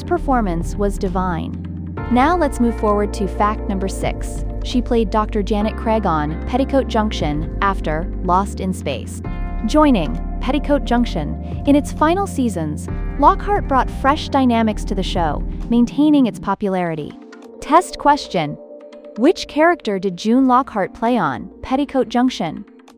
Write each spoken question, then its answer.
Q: Which character did June Lockhart play on Petticoat Junction?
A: Correct answer, Dr. Janet Craig.